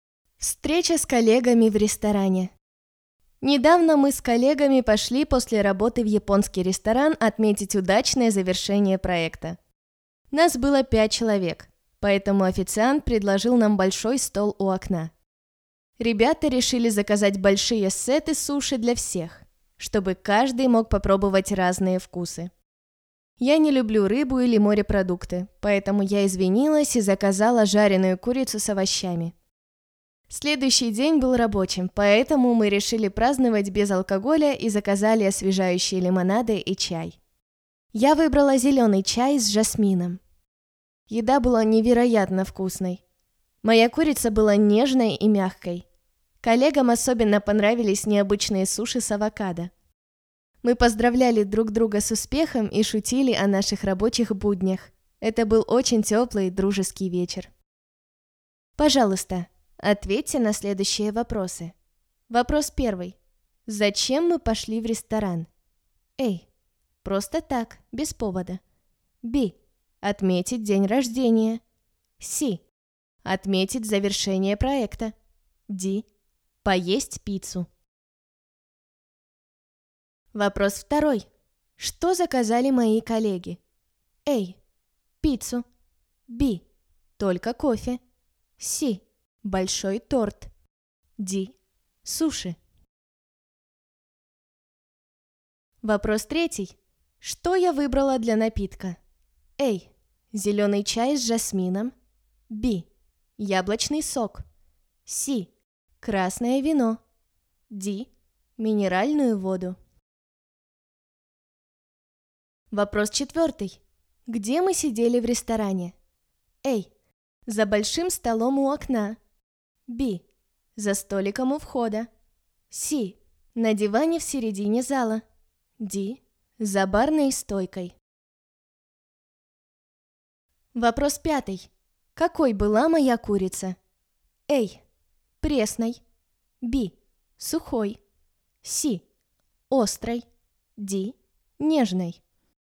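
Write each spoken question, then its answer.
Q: Зачем мы пошли в ресторан?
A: C: Отметить завершение проекта.

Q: Что заказали мои коллеги?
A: D: Суши.

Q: Что я выбрала для напитка?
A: A: Зеленый чай с жасмином.

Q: Где мы сидели в ресторане?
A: A: За большим столом у окна.

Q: Какой была моя курица?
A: D: Нежной.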